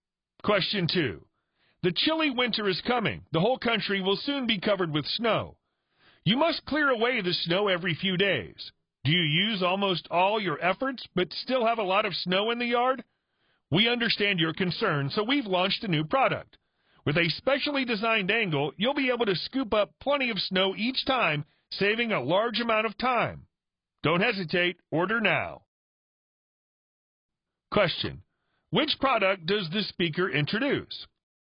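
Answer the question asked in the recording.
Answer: A snow shovel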